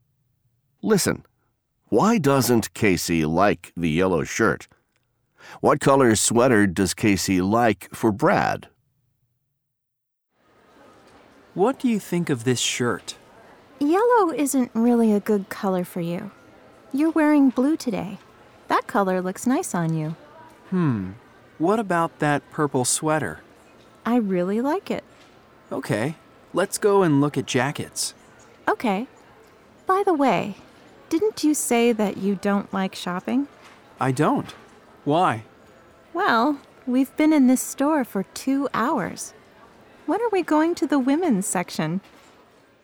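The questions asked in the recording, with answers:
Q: Why doesn't Casey like the yellow shirt?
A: Yellow isn't really a good color for Brad.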